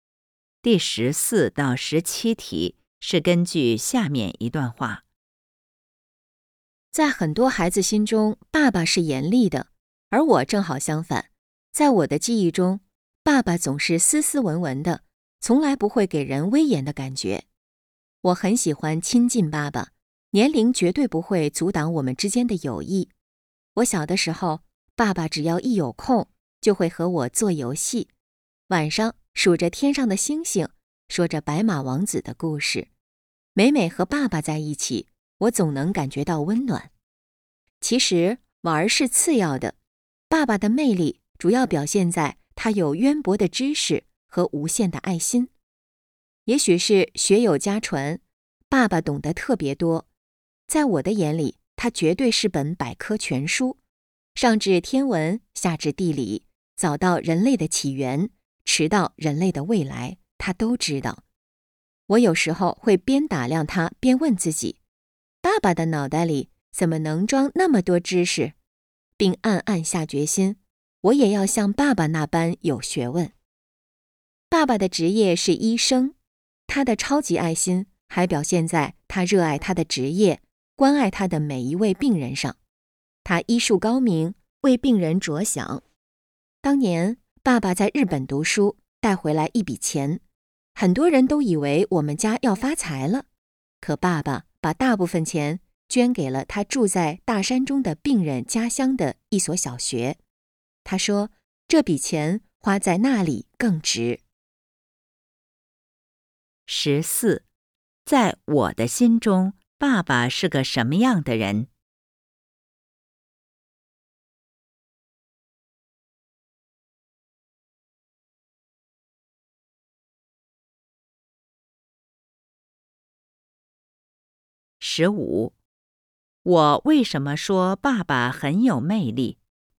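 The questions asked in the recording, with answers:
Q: 在我的心中,爸爸是个什么样的人?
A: 斯斯文文、不严厉的人

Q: 我为什么说爸爸很有魅力?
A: 他有渊博的知识和无限的爱心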